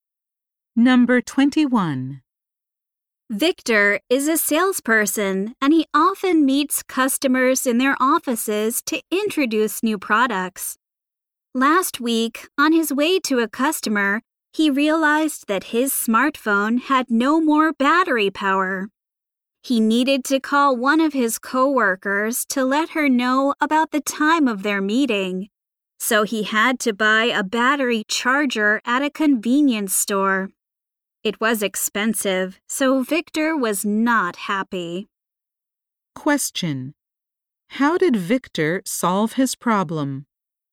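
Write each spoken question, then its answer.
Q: How did Victor solve his problem?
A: He bought a battery charger at a convenience store.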